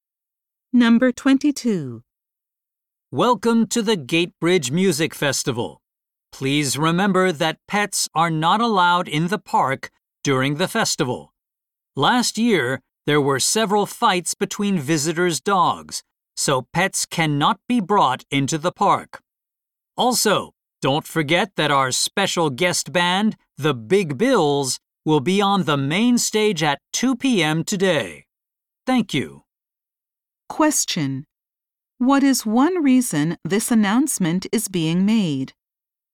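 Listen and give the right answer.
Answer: To remind visitors that pets are not allowed in the park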